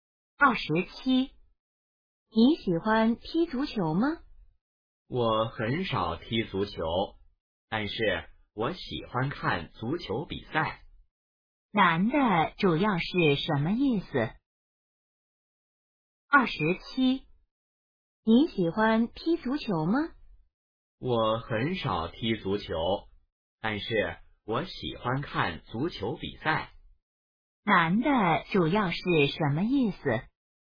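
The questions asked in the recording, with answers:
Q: 男的主要是什么意思?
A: 他很少踢足球,但喜欢看足球比赛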